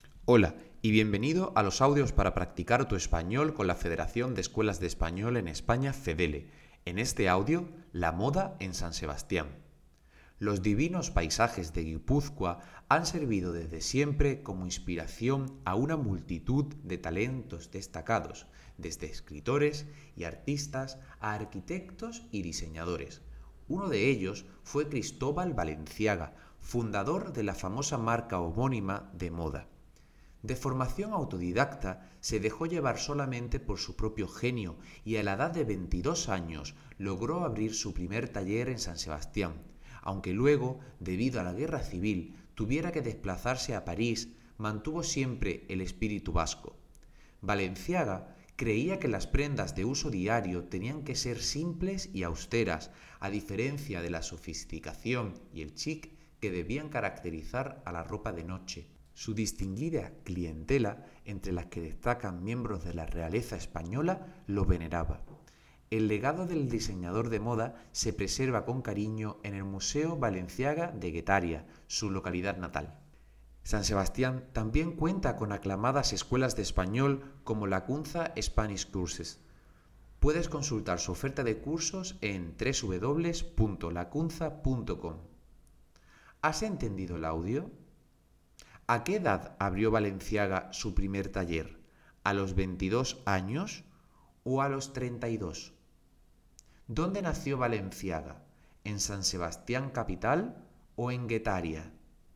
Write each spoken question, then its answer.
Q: ¿A qué edad abrió Valenciaga su primer taller?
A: Y su primer taller lo abrió a los 22 años.

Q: ¿Dónde nació Valenciaga? ¿En San Sebastián capital o en Guetaria?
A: Correcto, fue en Guetaria, donde está su museo.